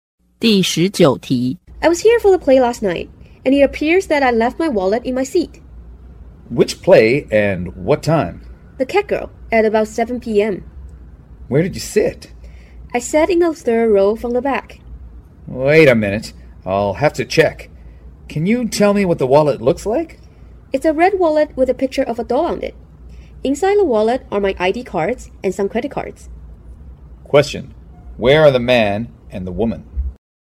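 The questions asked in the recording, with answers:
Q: Where are the man and the woman?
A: In a theater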